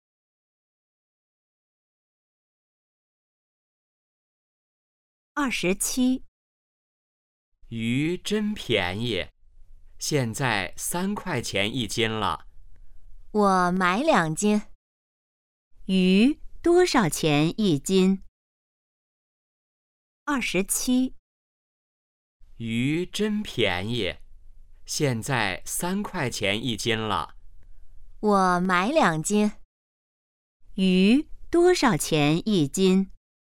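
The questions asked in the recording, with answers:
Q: 鱼多少钱一斤?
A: 3块钱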